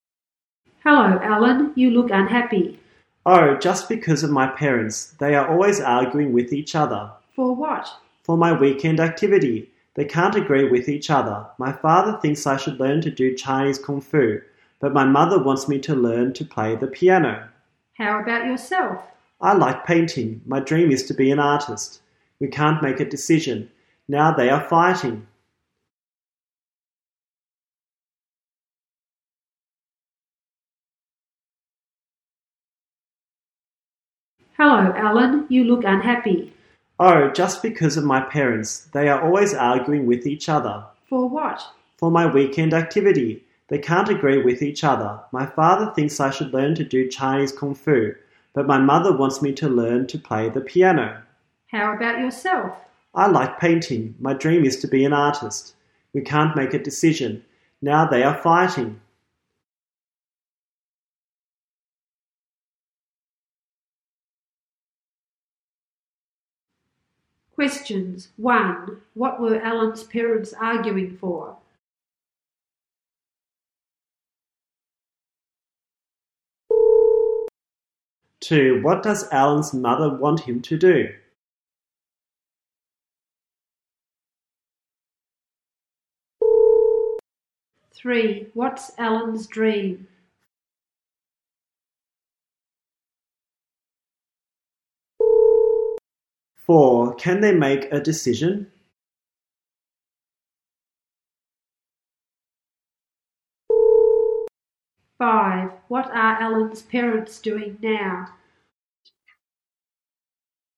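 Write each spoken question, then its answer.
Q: What were Alan's parents arguing for?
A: His weekend activity

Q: What does Alan's mother want him to do?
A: Learn to play the piano

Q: What's Alan's dream?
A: To be an artist

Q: Can they make a decision?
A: No, they can't

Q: What are Alan's parents doing now?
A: Fighting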